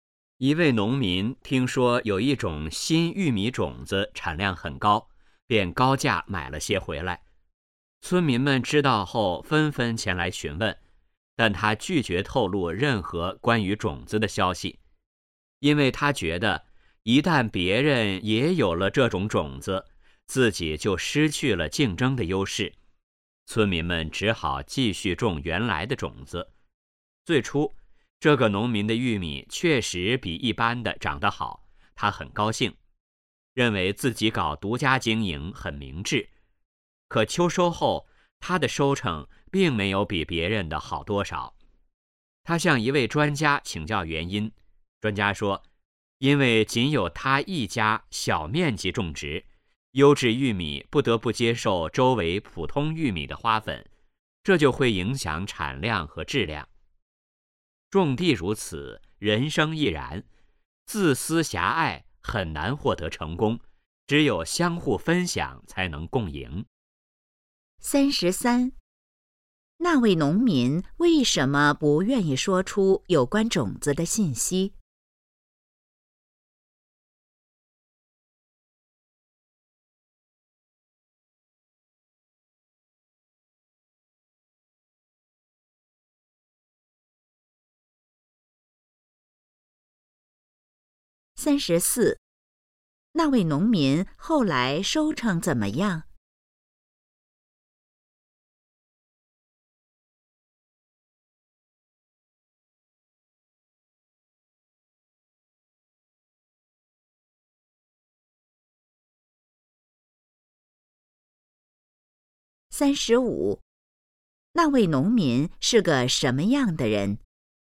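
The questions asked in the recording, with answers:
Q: 那位农民为什么不愿意说出有关种子的信息?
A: 怕失去竞争优势

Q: 那位农民后来收成怎么样?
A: 没比别人好多少

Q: 那位农民是个什么样的人?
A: 自私狭隘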